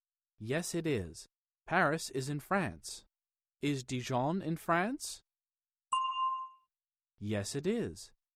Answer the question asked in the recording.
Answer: Yes, it is.